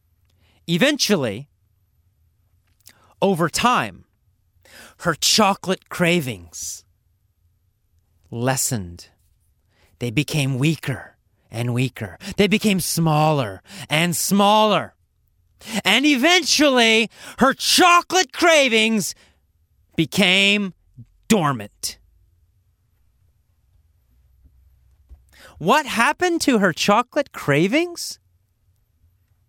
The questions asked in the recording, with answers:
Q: What happened to her chocolate cravings?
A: They became dormant. They became quiet.